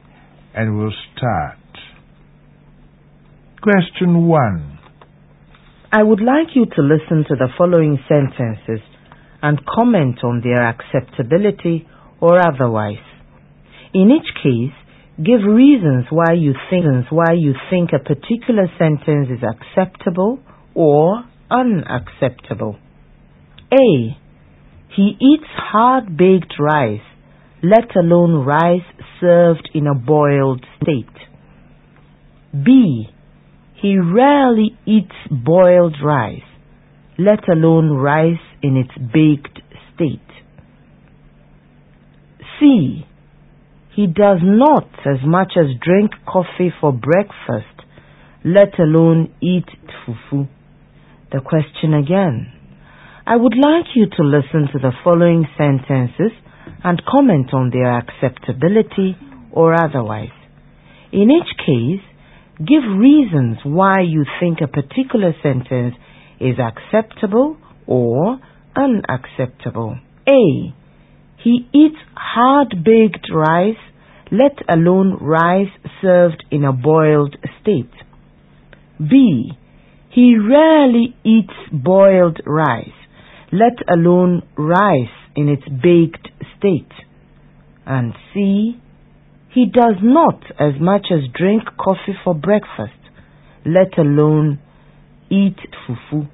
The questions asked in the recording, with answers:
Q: A. He eats hard-baked rice, let alone rice served in a boiled state.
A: The sentence is unacceptable for a number of reasons.

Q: B. He rarely eats boiled rice, let alone rice in its baked state.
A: A good sentence.

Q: C. He does not as much as drink coffee for breakfast, let alone eat fufu.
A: A good sentence. "Let alone" is here preceded by negation.